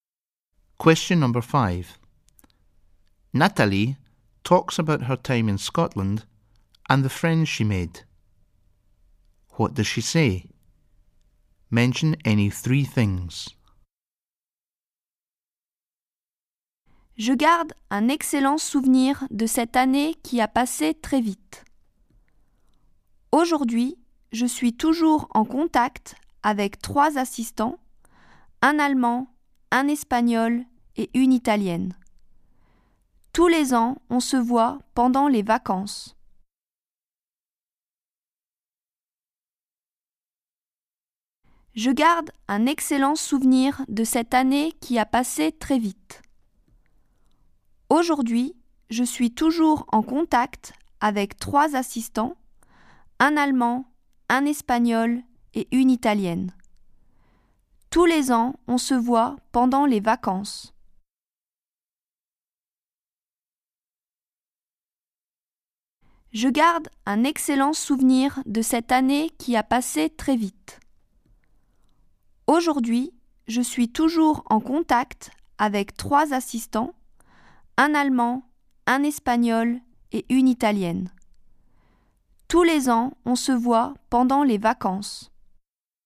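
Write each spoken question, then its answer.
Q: What does she say? Mention any 3 things.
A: She has excellent memories of the year; it passed very quickly; she is still in contact with 3 assistants (German, Spanish, Italian); they meet every year during the holidays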